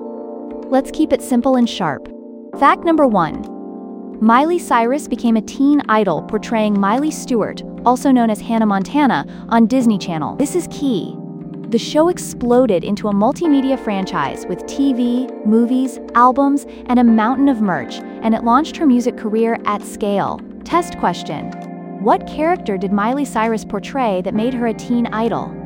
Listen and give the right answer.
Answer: Correct answer, Hannah Montana.